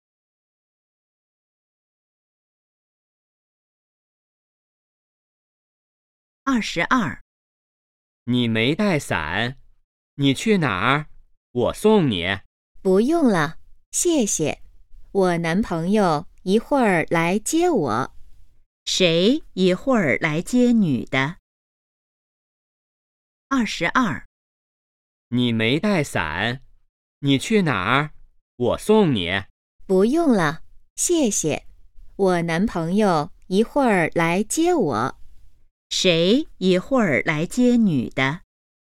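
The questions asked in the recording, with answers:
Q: 谁一会儿来接女的?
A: 她男朋友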